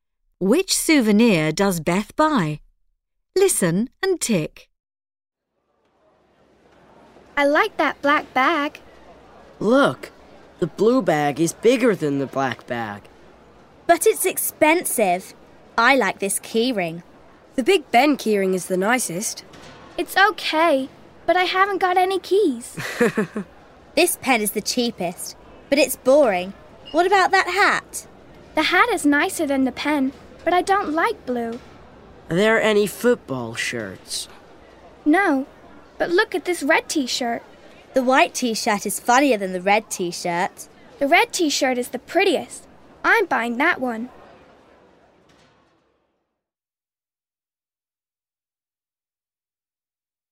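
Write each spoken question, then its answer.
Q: Which souvenir does Beth buy?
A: the red t-shirt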